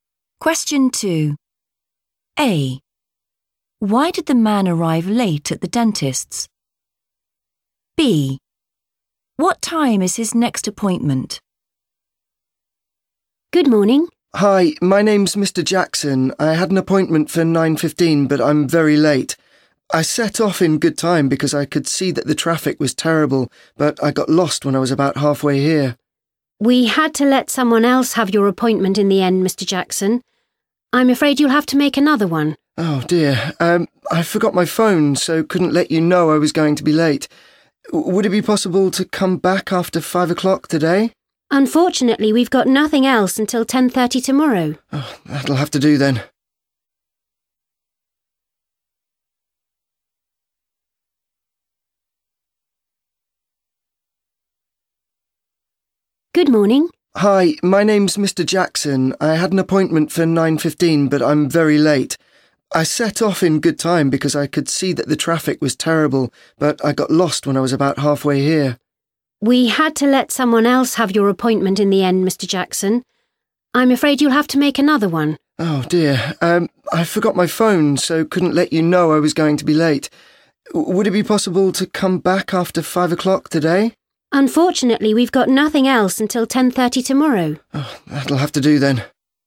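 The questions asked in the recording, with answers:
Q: Why did the man arrive late at the dentist's?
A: he got lost

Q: What time is his next appointment?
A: 10:30 tomorrow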